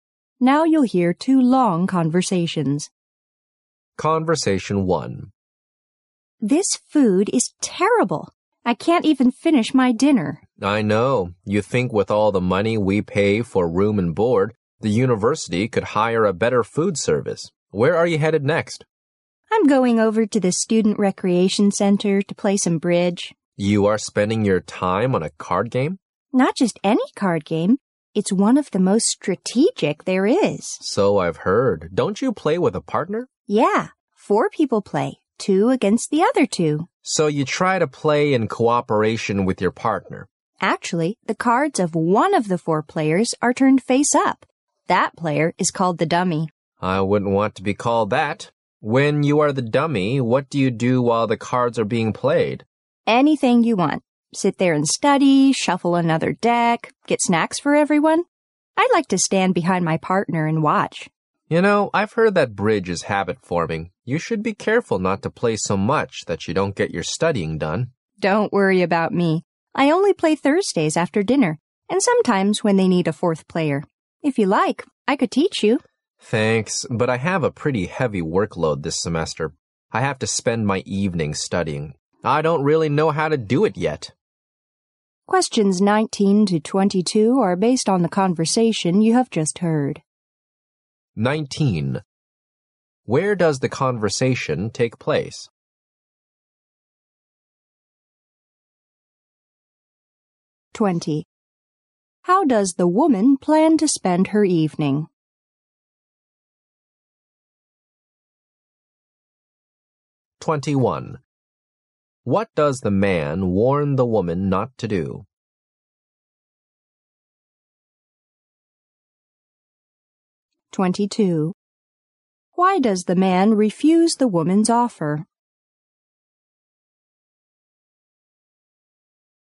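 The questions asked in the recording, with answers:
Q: How does the woman plan to spend her evening?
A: Playing bridge at the Student Recreation Center

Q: What does the man warn the woman not to do?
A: Play bridge so much that she doesn't get her studying done

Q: Why does the man refuse the woman's offer?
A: He has a heavy workload and must study in the evening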